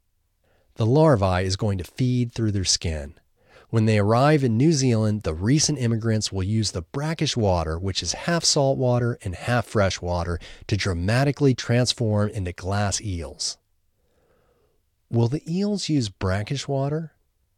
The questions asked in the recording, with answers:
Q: Will the eels use brackish water?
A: Yes, the eels will use brackish water.